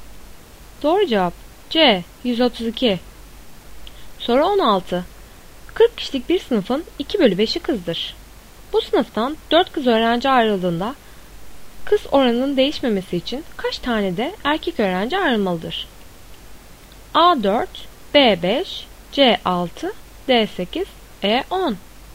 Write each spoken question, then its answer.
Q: Bu sınıftan 4 kız öğrenci ayrıldığında kız oranının değişmemesi için kaç tane de erkek öğrenci ayrılmalıdır?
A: Doğru cevap C6.